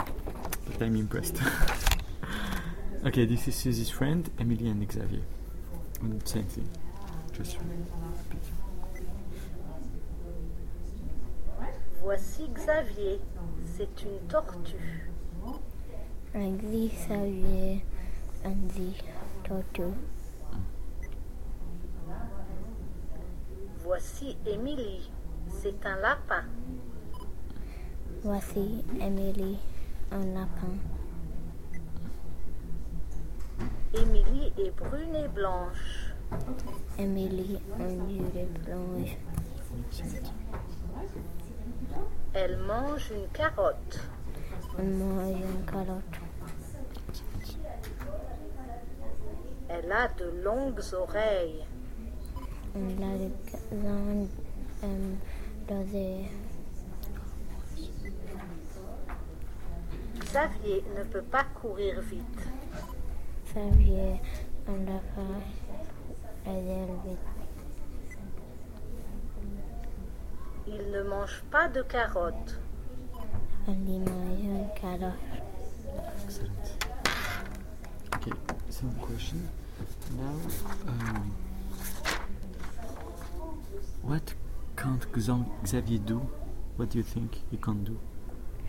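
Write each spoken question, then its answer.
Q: what can't Xavier do? What do you think he can't do?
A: He can't run fast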